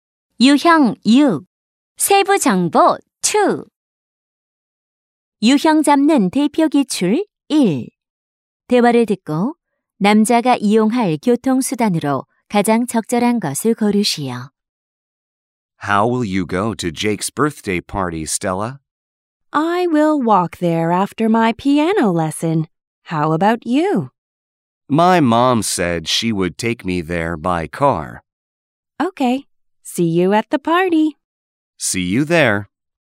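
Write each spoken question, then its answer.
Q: 대화를 듣고 남자가 이용할 교통수단으로 가장 적절한 것을 고르시오.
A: 자동차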